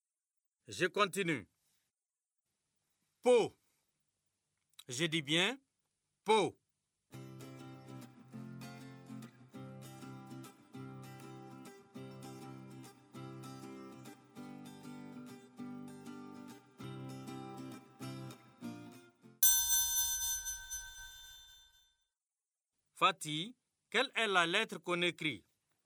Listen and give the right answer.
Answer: Monsieur, c'est la lettre P.